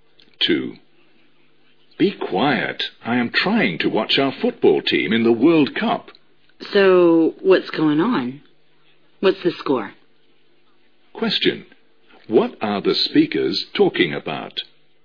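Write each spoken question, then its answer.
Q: What are the speakers talking about?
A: A World Cup football match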